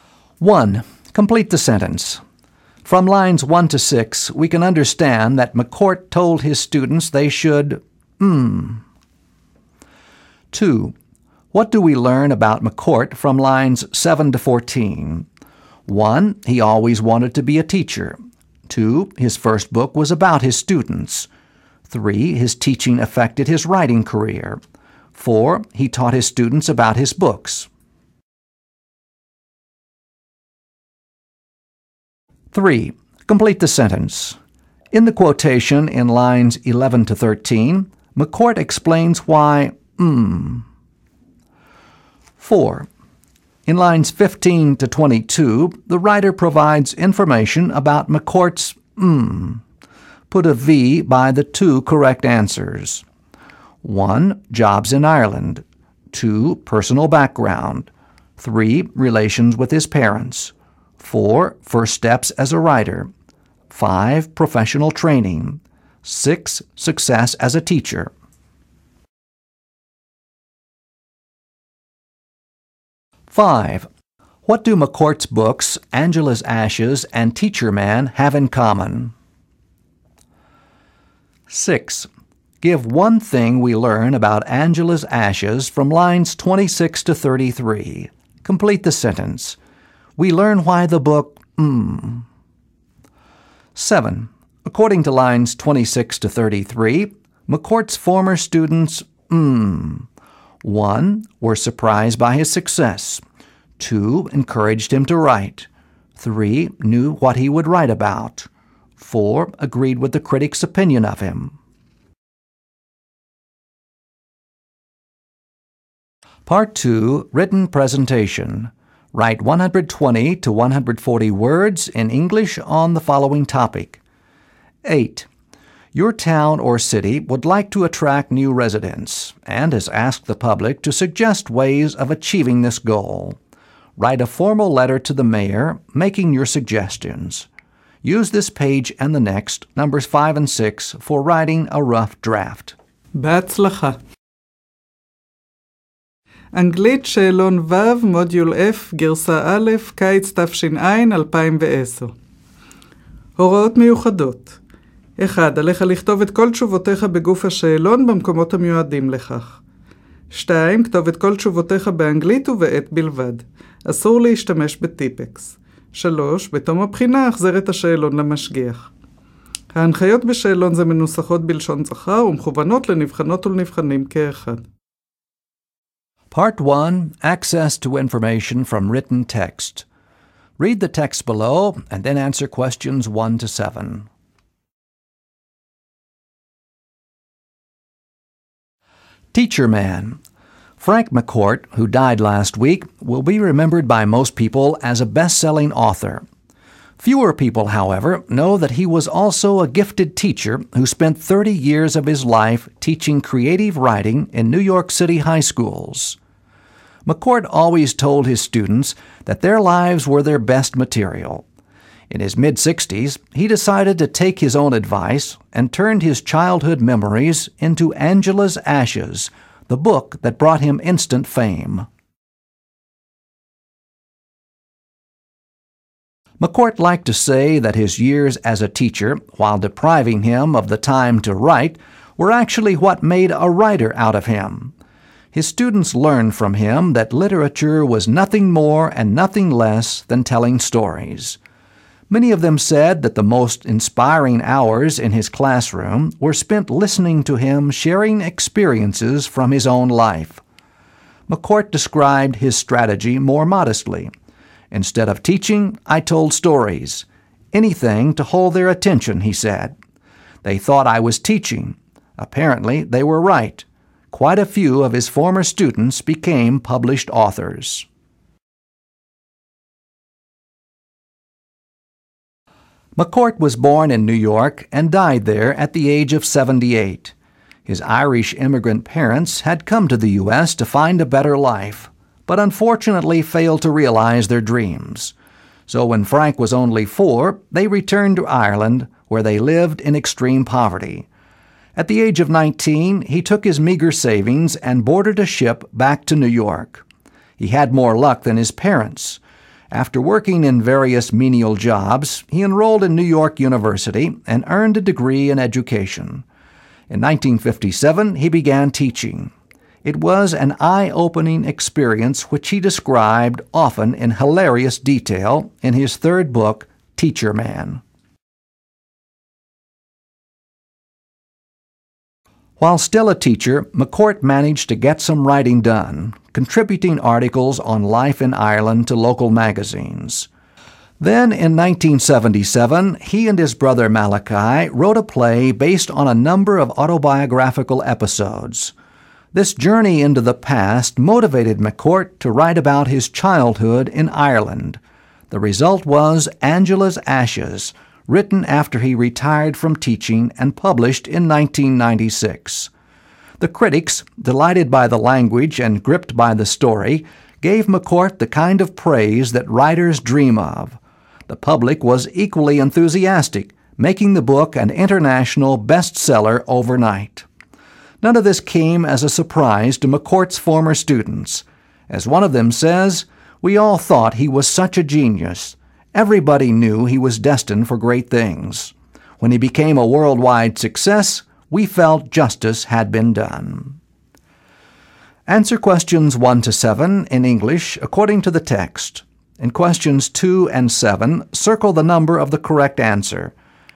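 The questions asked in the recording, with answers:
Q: Complete the sentence. From lines 1 to 6, we can understand that McCourt told his students they should,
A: write about their own lives

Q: What do we learn about McCourt from lines 7 to 14?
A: 3: His teaching affected his writing career.

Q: What do McCourt's books, Angela's Ashes and Teacher Man, have in common?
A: Both are based on his own life experiences

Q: According to lines 26 to 33, McCourt's former students,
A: 4: Agreed with the critic's opinion of him.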